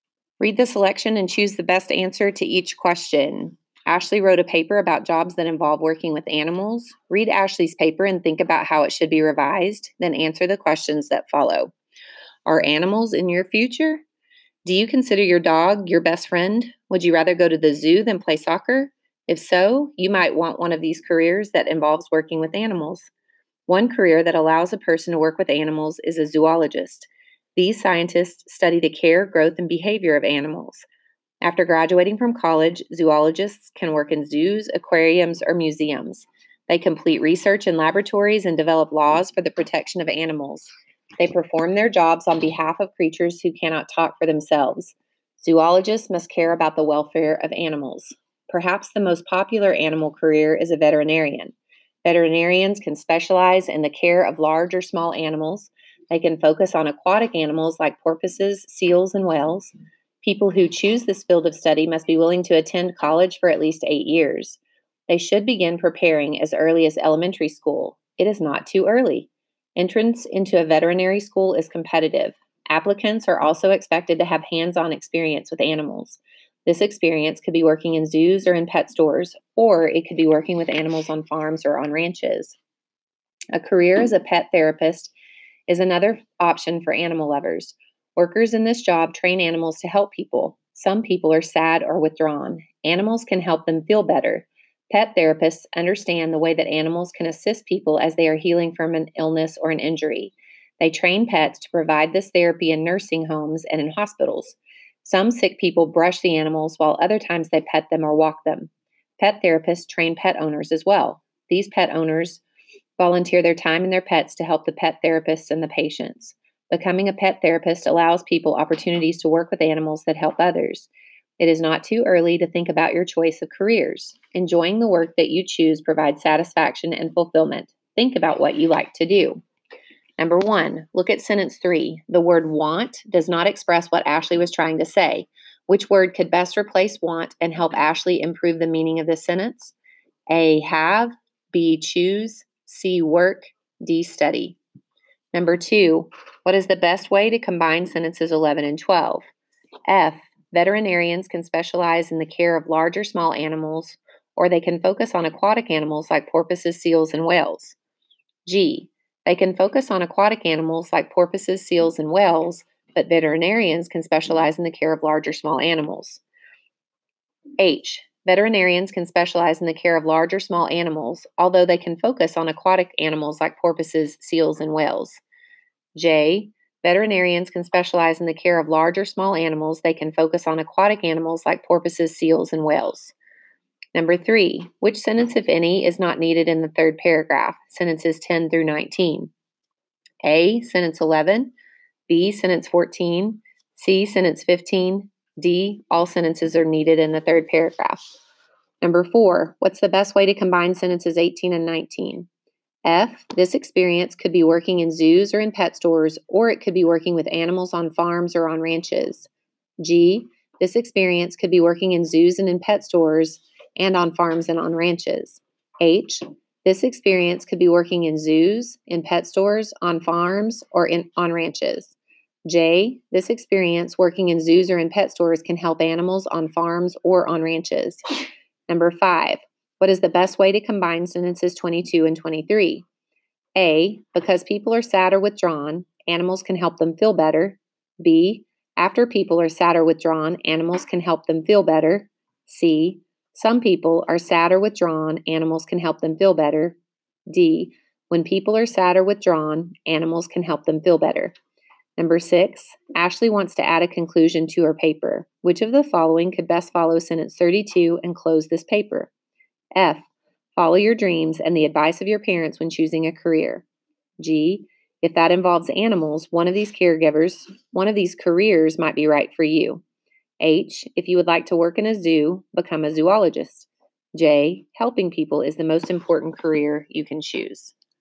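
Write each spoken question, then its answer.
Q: Which word could best replace want and help Ashley improve the meaning of this sentence?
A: B: choose

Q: what is the best way to combine sentences 11 and 12?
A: F: veterinarians can specialize in the care of large or small animals, or they can focus on aquatic animals like porpoises, seals, and whales.

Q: what's the best way to combine sentences 18 and 19?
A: H: this experience could be working in zoos, in pet stores, on farms, or on ranches.

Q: what is the best way to combine sentences 22 and 23?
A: D: when people are sad or withdrawn, animals can help them feel better.

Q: Which of the following could best follow sentence 32 and close this paper?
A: G: if that involves animals, one of these careers might be right for you.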